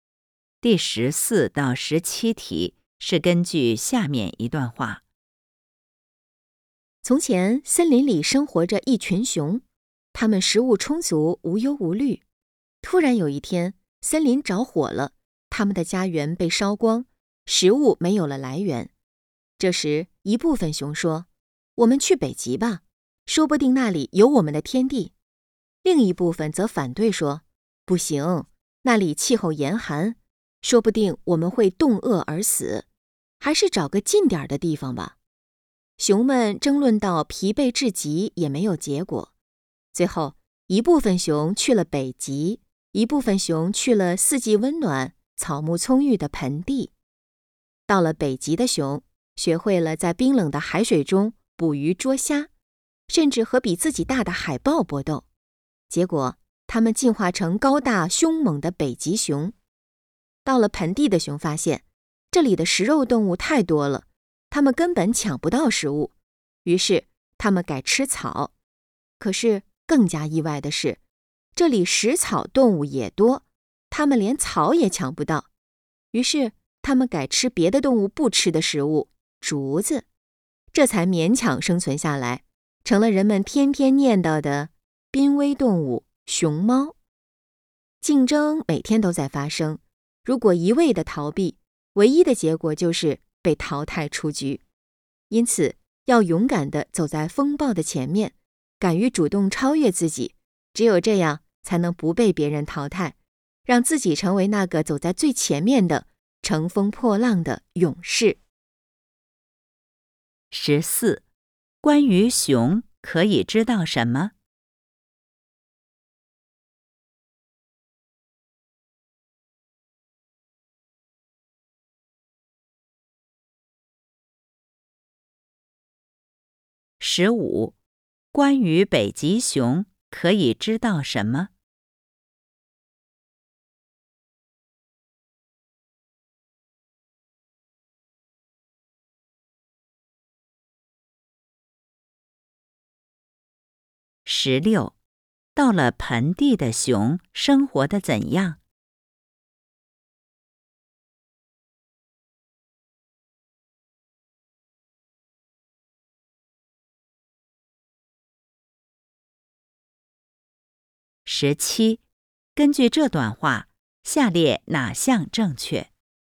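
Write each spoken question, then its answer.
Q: 到了盆地的熊生活得怎样?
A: 抢不到食物,只能改吃竹子勉强生存,成了濒危动物熊猫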